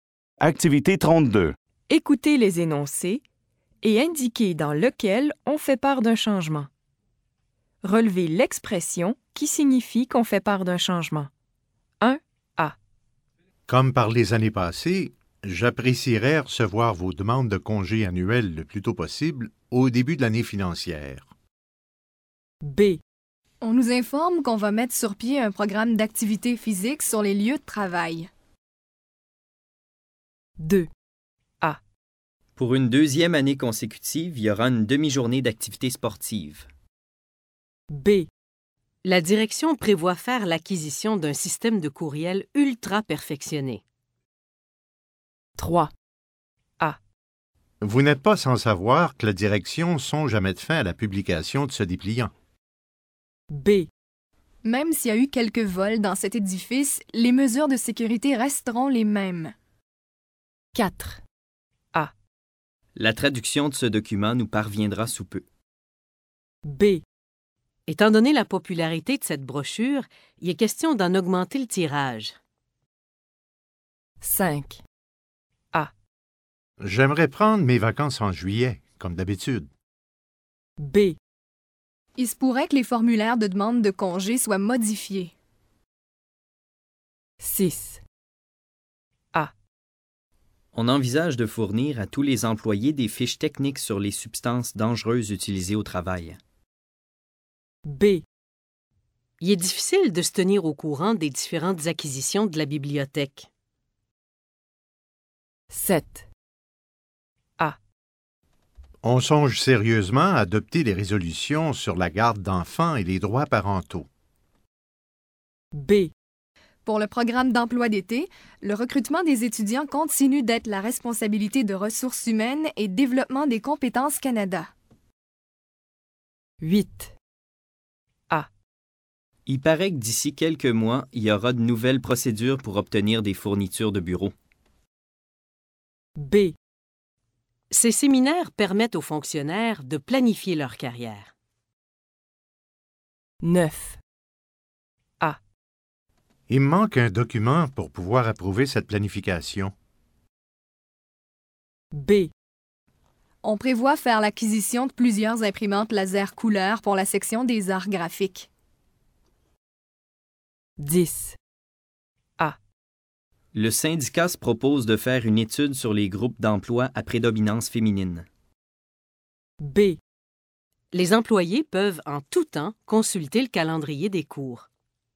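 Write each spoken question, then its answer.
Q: Écoutez les énoncés et indiquez dans lequel on fait part d'un changement.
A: B: On nous informe qu'on va mettre sur pied un programme d'activité physique sur les lieux de travail.

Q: Écoutez les énoncés et indiquez dans lequel on fait part d'un changement.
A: B: La direction prévoit faire l'acquisition d'un système de courriel ultra perfectionné.

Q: Écoutez les énoncés et indiquez dans lequel on fait part d'un changement.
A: A: Vous n'êtes pas sans savoir que la direction songe à mettre fin à la publication de ce dépliant.

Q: Écoutez les énoncés et indiquez dans lequel on fait part d'un changement.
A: B: Étant donné la popularité de cette brochure, il est question d'en augmenter le tirage.

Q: Écoutez les énoncés et indiquez dans lequel on fait part d'un changement.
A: B: Il se pourrait que les formulaires de demande de congé soient modifiés.

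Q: Écoutez les énoncés et indiquez dans lequel on fait part d'un changement.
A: A: On envisage de fournir à tous les employés des fiches techniques sur les substances dangereuses.

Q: Écoutez les énoncés et indiquez dans lequel on fait part d'un changement.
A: A: On songe sérieusement à adopter les résolutions sur la garde d'enfants et les droits parentaux.

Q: Écoutez les énoncés et indiquez dans lequel on fait part d'un changement.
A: A: Il paraît que d'ici quelques mois, il y aura de nouvelles procédures pour obtenir des fournitures de bureaux.

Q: Écoutez les énoncés et indiquez dans lequel on fait part d'un changement.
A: B: On prévoit faire l'acquisition de plusieurs imprimantes laser couleur.

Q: Écoutez les énoncés et indiquez dans lequel on fait part d'un changement.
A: A: Le syndicat se propose de faire une étude sur les groupes d'emploi à prédominance féminine.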